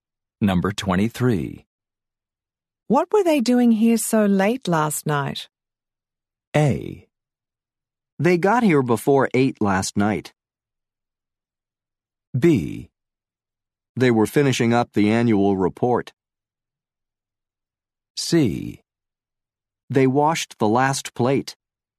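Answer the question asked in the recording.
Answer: B: They were finishing up the annual report.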